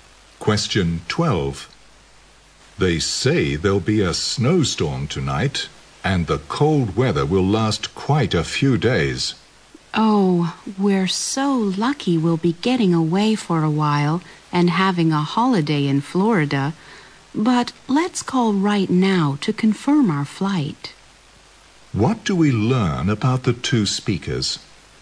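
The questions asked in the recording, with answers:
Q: What do we learn about the two speakers?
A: They are going on holiday to Florida and will fly there.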